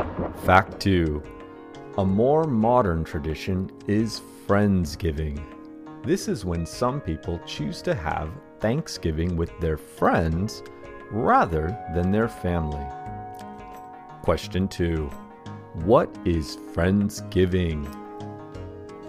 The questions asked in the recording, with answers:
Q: What is Friendsgiving?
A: Friendsgiving is a more modern tradition when some people choose to have Thanksgiving with their friends rather than their family.